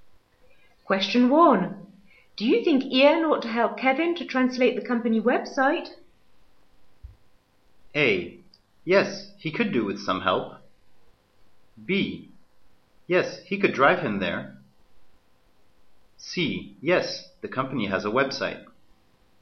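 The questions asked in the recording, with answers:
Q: Do you think Ian ought to help Kevin to translate the company website?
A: A: Yes, he could do with some help.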